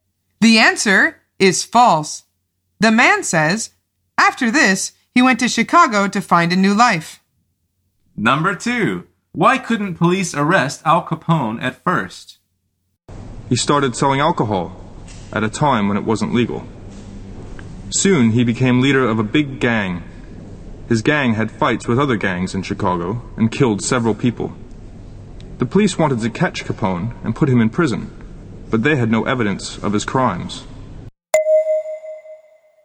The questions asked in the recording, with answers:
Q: why couldn't police arrest Al Capone at first?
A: The answer is because they had no evidence.